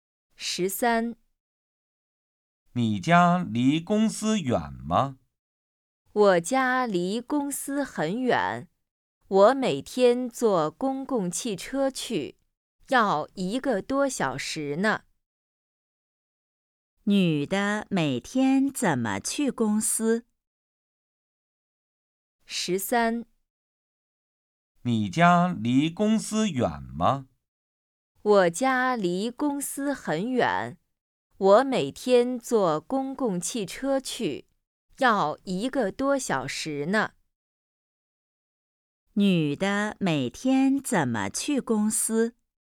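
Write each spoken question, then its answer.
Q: 女的每天怎么去公司?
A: 坐公共汽车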